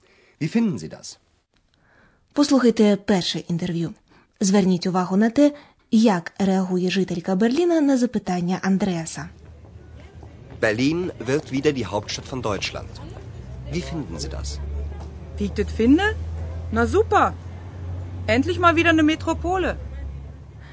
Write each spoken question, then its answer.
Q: Зверніть увагу на те, як реагує жителька Берліна на запитання Андреаса.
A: На чисто берлінському діалекті жінка висловлює своє захоплення.